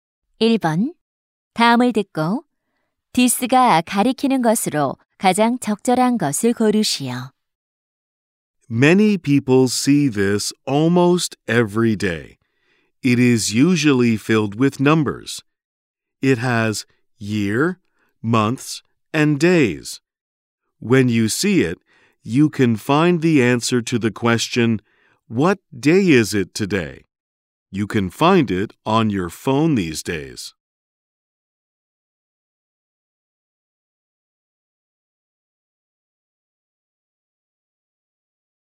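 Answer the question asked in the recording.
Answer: 달력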